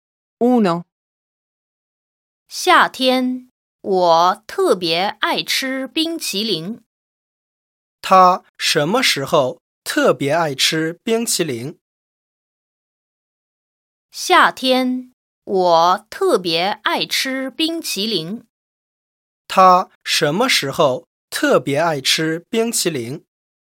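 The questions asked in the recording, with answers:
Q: 他什么时候特别爱吃冰淇淋?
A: 夏天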